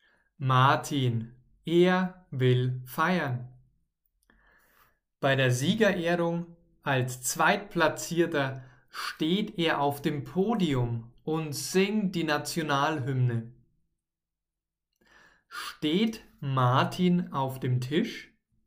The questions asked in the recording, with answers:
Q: Steht Martin auf dem Tisch?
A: Nein, er steht nicht auf einem Tisch, sondern er steht auf dem Podium.